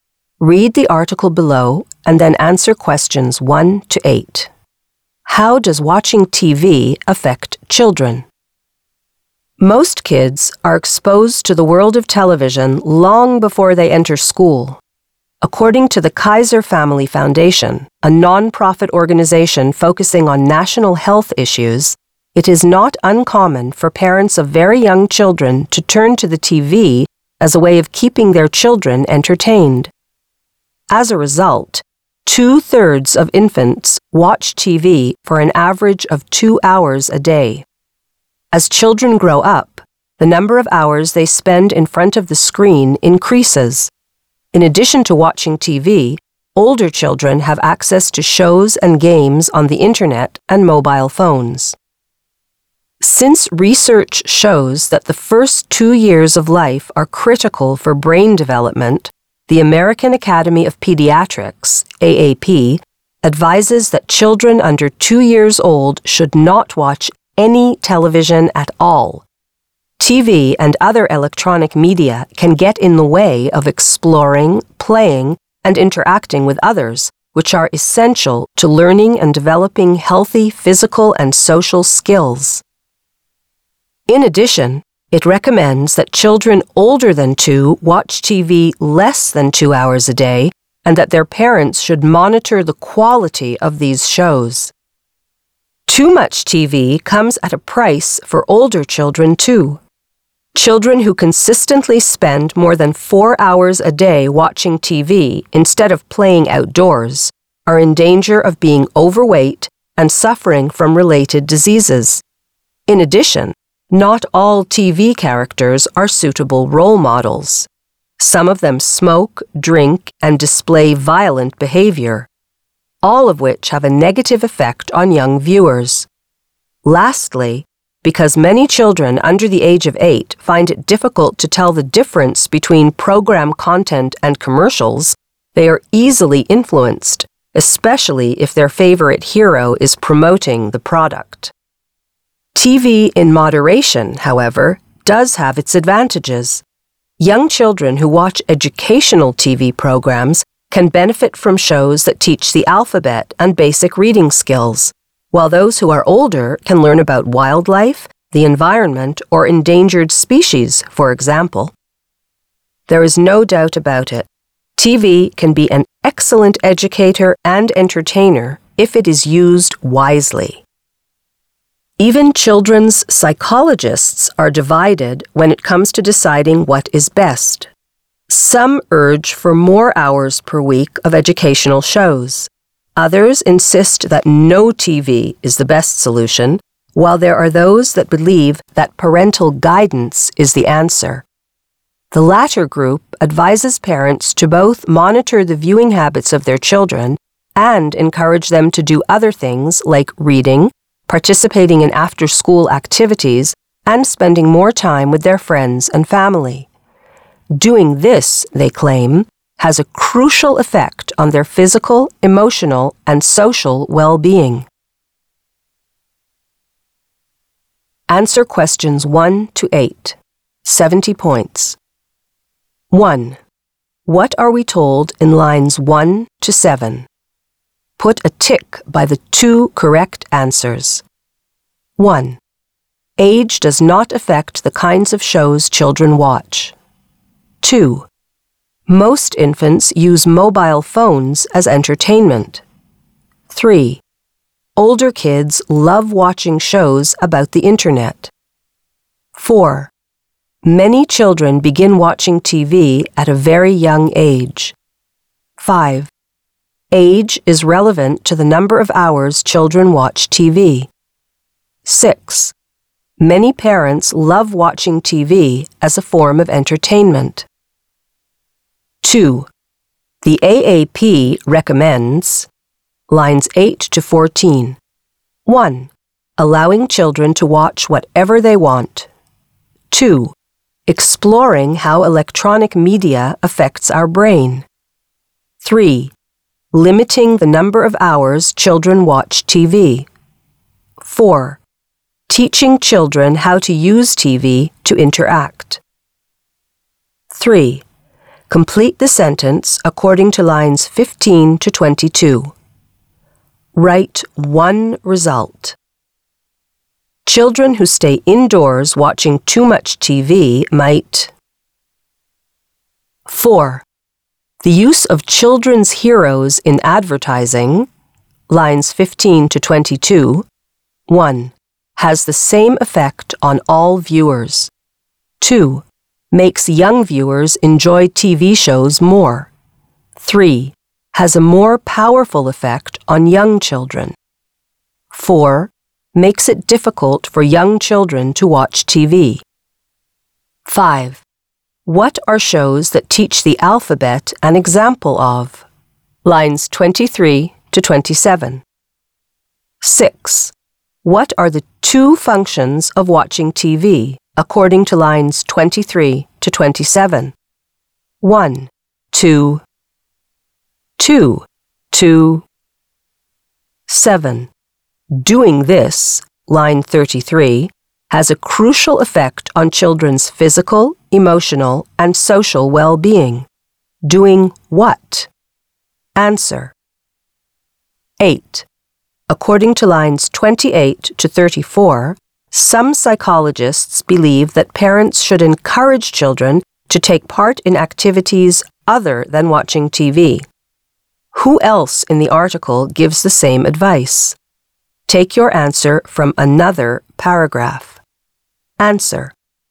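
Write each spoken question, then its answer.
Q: What are we told in lines 1 to 7?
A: 4: Many children begin watching TV at a very young age; 5: Age is relevant to the number of hours children watch TV.

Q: The AAP recommends lines 8 to 14.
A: 3: Limiting the number of hours children watch TV.

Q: Complete the sentence according to lines 15 to 22.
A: be in danger of being overweight and suffering from related diseases

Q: The use of children's heroes in advertising, lines 15 to 22,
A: 3: has a more powerful effect on young children.

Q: What are shows that teach the alphabet an example of?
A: educational TV programs

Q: What are the two functions of watching TV, according to lines 23 to 27?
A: educator and entertainer

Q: Doing what?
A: monitoring children's viewing habits and encouraging them to do other things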